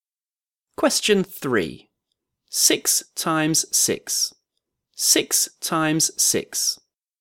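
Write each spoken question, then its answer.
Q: 6 times 6. 6 times 6.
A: 36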